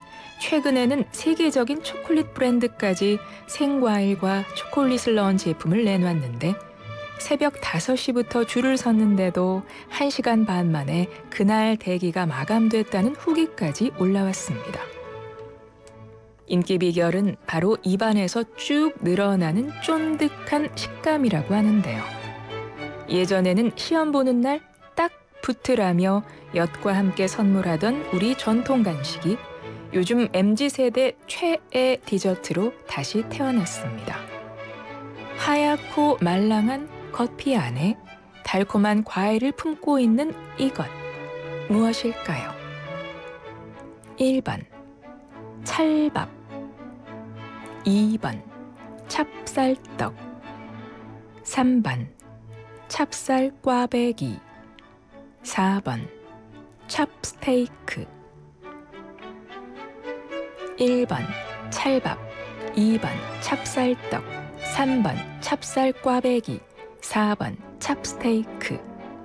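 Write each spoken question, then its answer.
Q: 하얗고 말랑한 겉피 안에 달콤한 과일을 품고 있는 이것, 무엇일까요?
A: 2: 찹쌀떡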